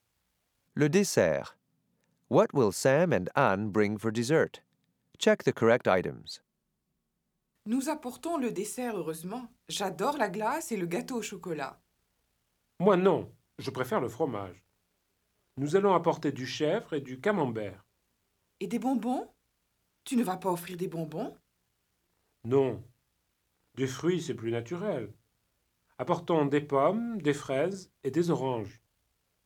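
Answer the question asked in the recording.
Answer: Goat cheese, camembert, apples, strawberries and oranges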